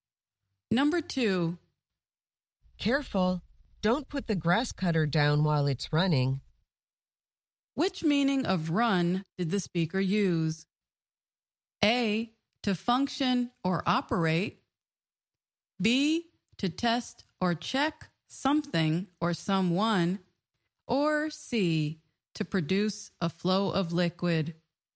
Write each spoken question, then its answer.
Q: Which meaning of run did the speaker use?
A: The answer is A, to function or operate.